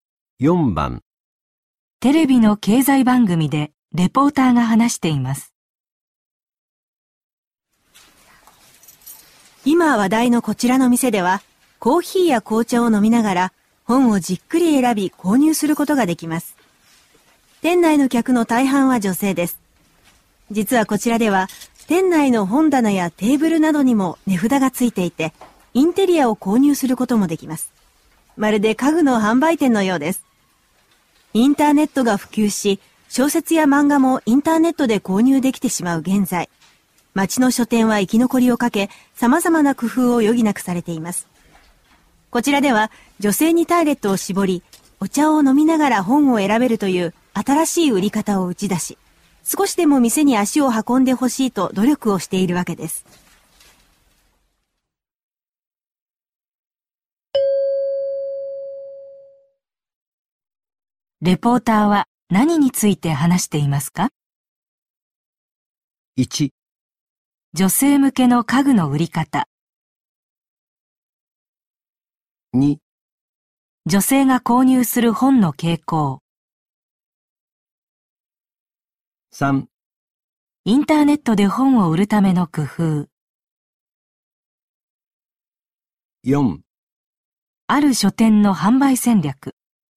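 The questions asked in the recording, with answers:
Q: レポーターは何について話していますか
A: 4: ある書店の販売戦略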